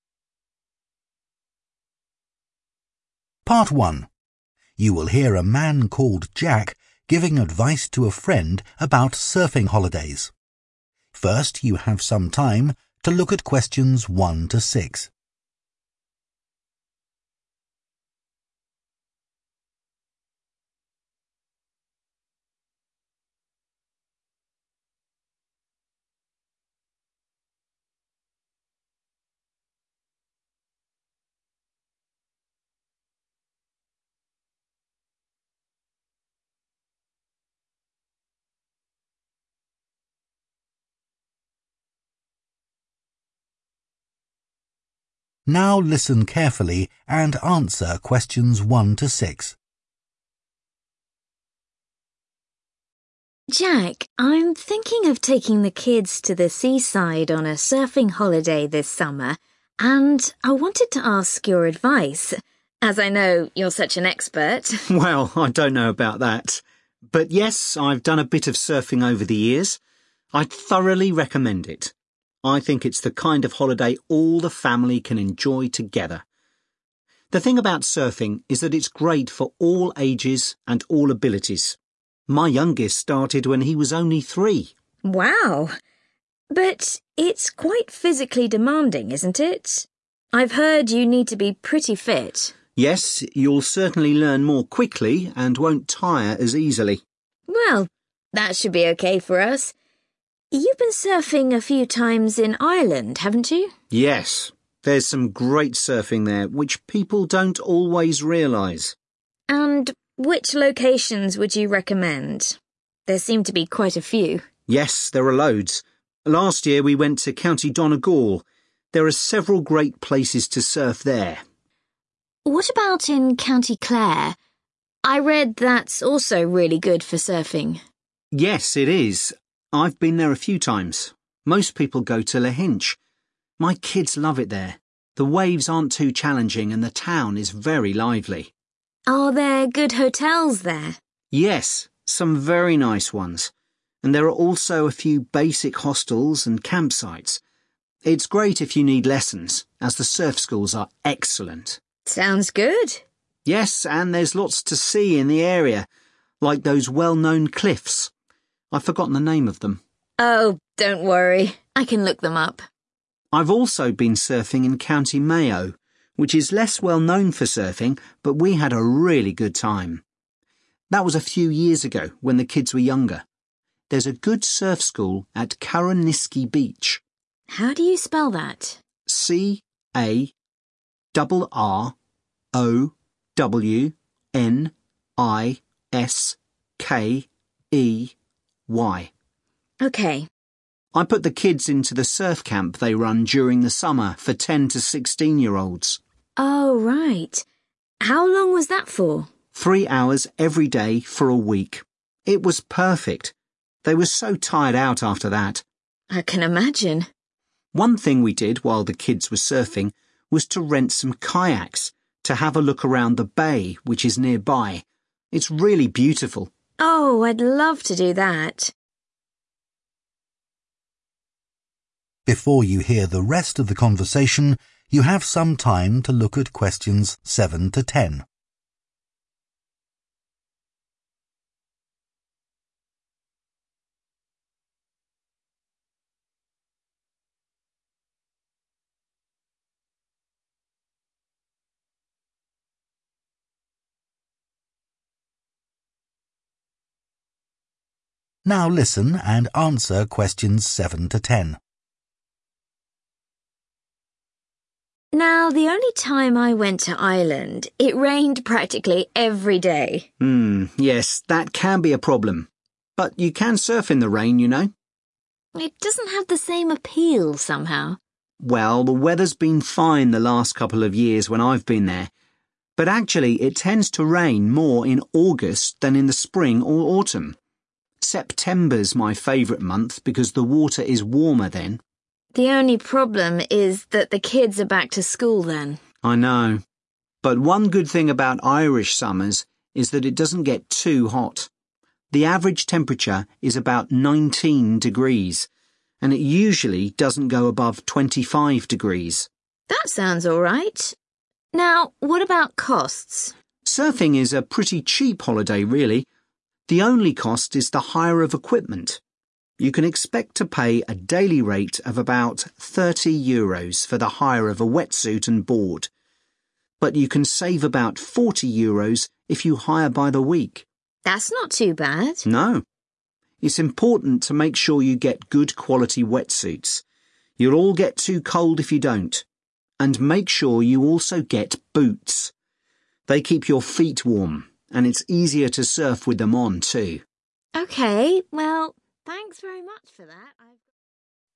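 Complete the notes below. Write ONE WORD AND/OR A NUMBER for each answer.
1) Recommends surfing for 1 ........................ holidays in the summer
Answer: family

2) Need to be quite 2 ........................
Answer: fit

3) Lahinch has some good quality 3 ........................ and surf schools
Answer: hotels

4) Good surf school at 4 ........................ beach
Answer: Carrowniskey

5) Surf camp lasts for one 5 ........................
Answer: week

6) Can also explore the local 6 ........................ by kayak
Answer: bay

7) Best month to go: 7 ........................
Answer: September

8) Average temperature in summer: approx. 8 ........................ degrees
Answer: 19

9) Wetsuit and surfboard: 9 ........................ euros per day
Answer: 30

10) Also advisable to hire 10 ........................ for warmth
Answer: boots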